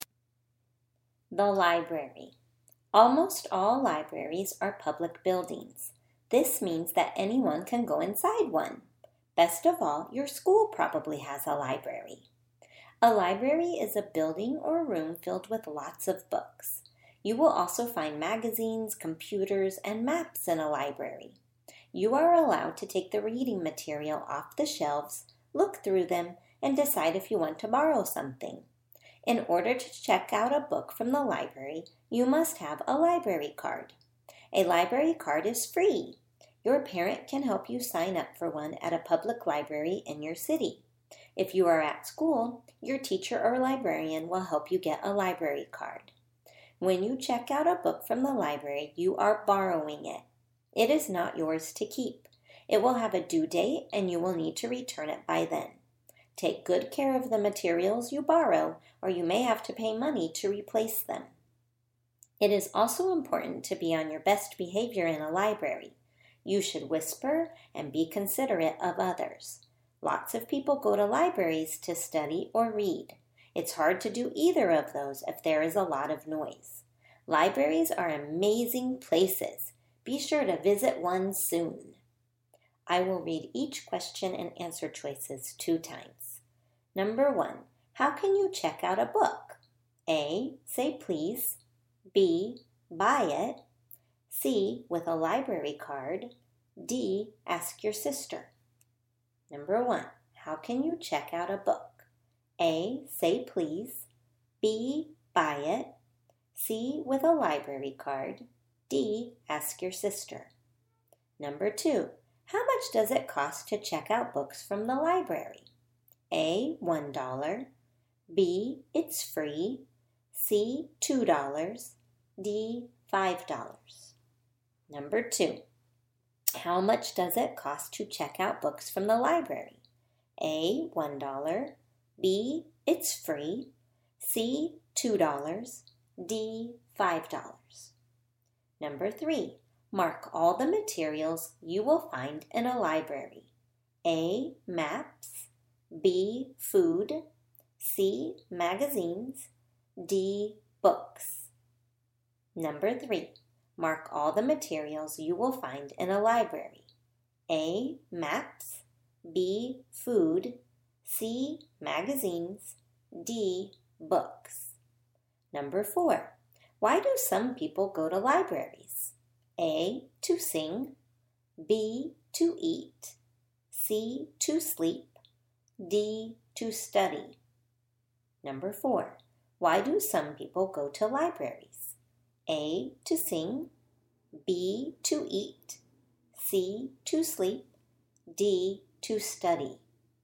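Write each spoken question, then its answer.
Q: how can you check out a book?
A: C: with a library card

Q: how much does it cost to check out books from the library?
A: B: it's free

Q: mark all the materials you will find in a library.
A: A: maps, C: magazines, D: books

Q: why do some people go to libraries?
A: D: to study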